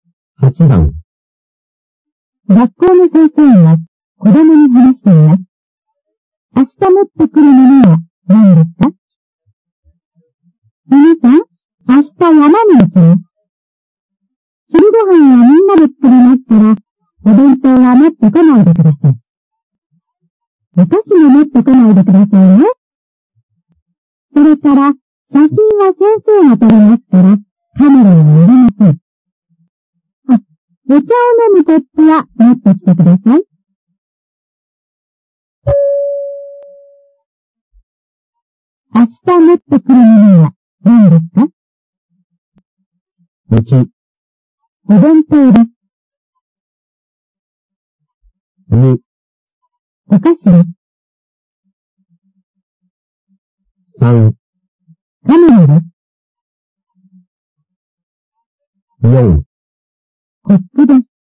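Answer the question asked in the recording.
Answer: 4: コップです。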